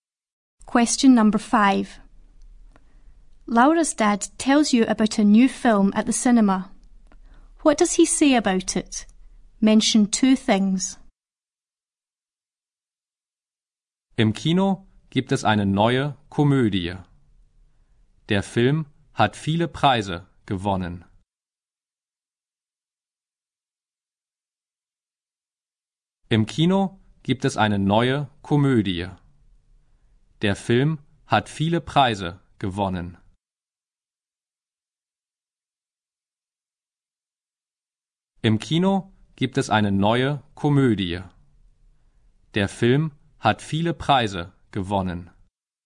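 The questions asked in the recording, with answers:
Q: What does he say about it?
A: It is a new comedy and it has won many prizes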